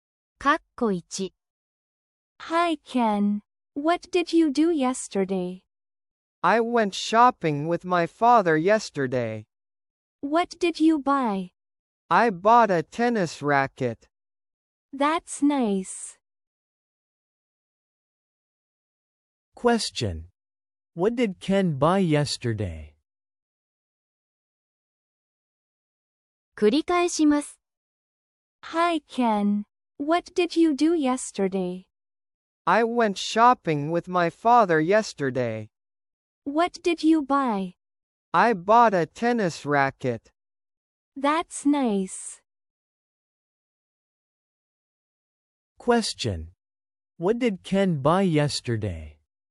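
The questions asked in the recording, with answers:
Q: What did Ken buy yesterday?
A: A tennis racket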